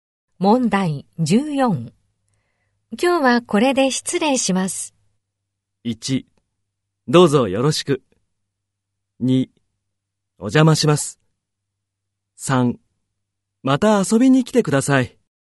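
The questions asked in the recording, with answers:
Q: 今日はこれで失礼します。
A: 1: また遊びに来てください。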